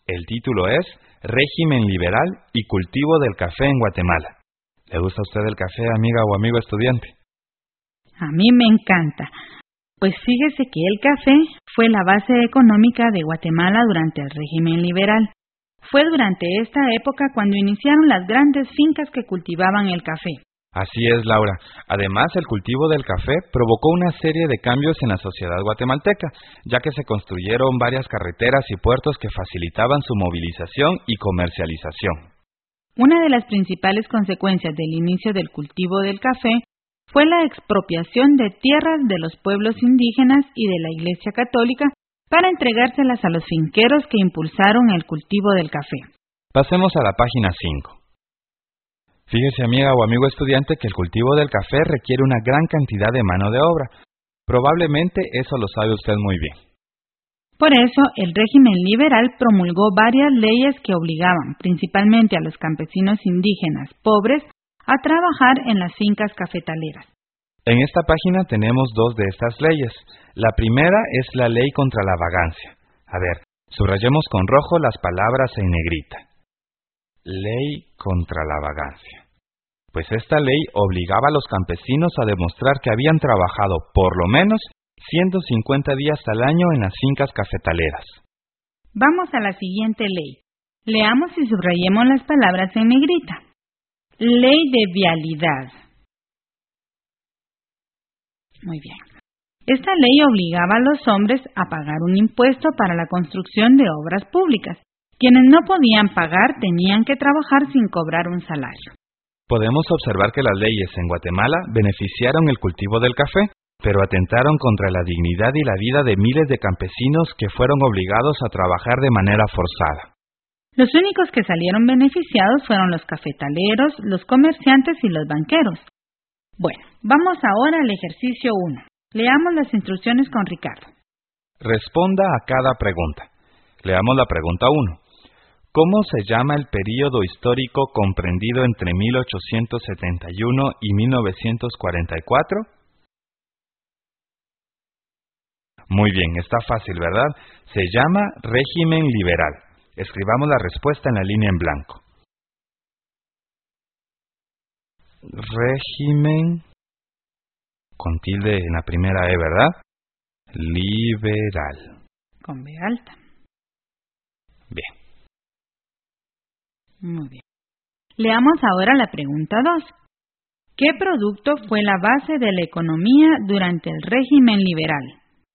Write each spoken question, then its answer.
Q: ¿Qué producto fue la base de la economía durante el régimen liberal?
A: Correcto, es el café.